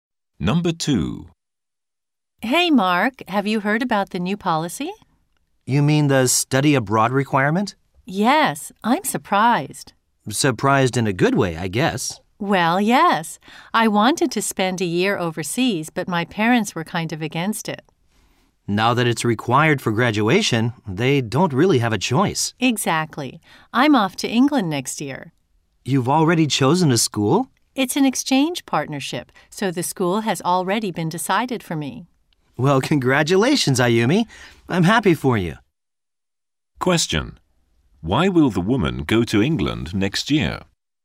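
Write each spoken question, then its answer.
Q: Why will the woman go to England next year?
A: Study abroad is now required for graduation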